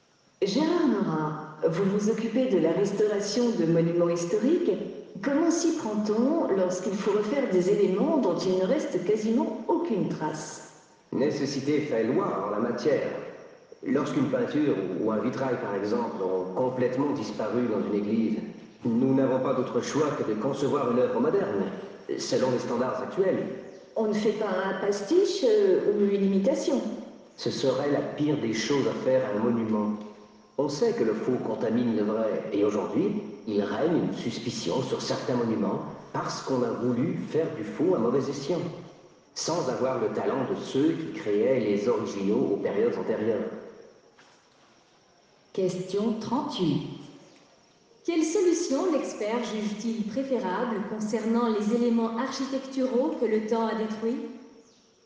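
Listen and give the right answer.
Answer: Concevoir une œuvre moderne, selon les standards actuels, plutôt qu'une imitation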